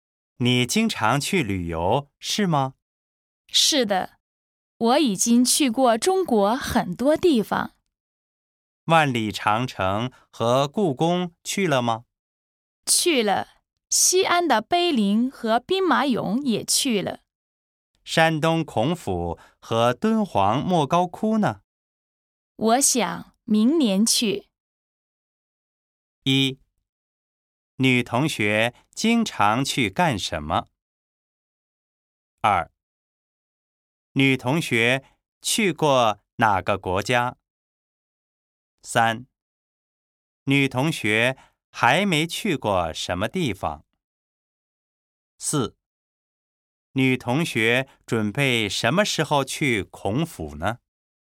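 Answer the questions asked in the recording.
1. 旅游
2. 中国
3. 山东孔府和敦煌莫高窟
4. 明年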